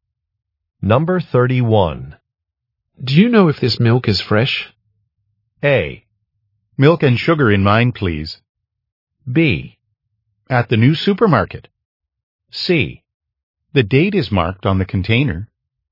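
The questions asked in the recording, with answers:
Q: Do you know if this milk is fresh?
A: C: The date is marked on the container.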